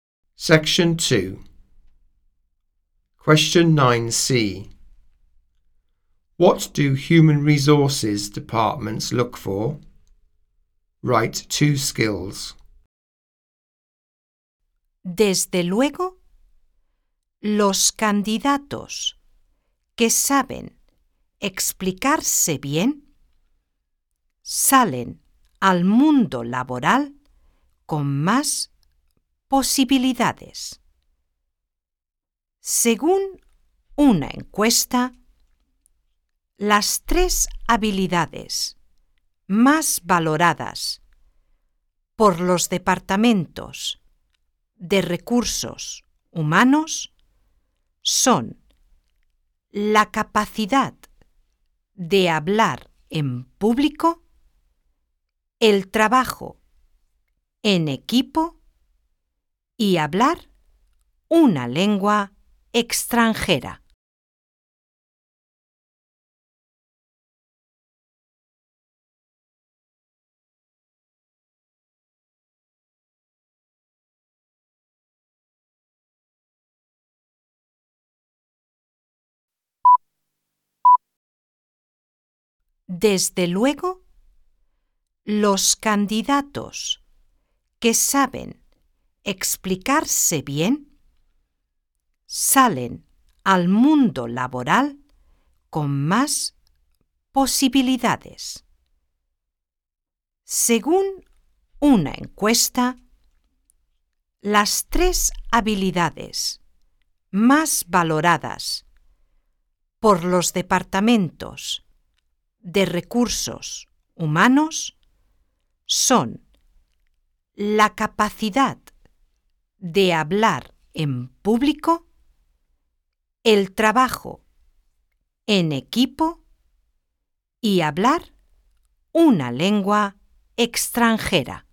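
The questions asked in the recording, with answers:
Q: What do human resources departments look for?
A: Public speaking, teamwork, speaking a foreign language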